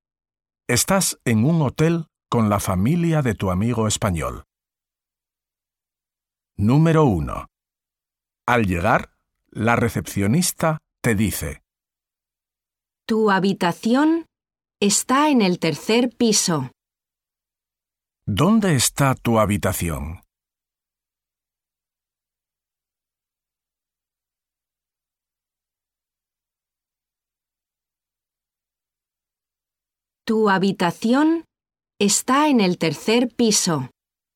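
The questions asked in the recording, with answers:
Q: ¿Dónde está tu habitación?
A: En el tercer piso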